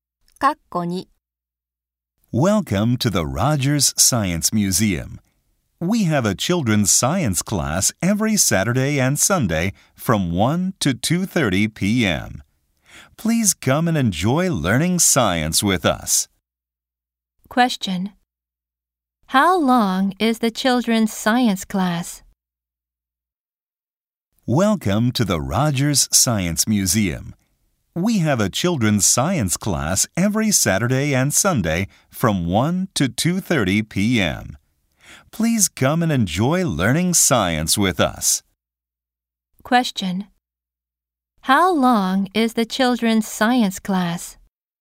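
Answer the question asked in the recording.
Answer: An hour and a half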